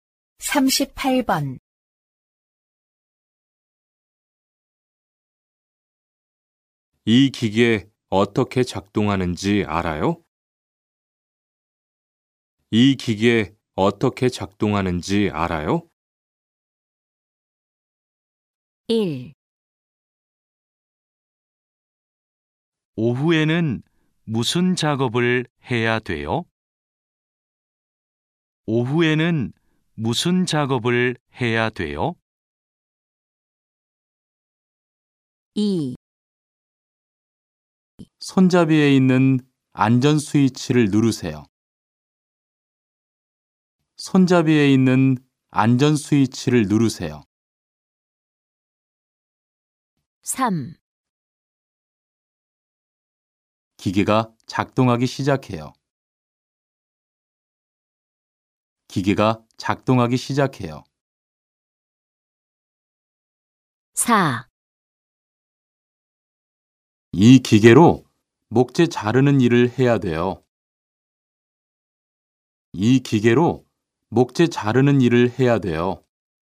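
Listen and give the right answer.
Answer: 2: 손잡이에 있는 안전 스위치를 누르세요.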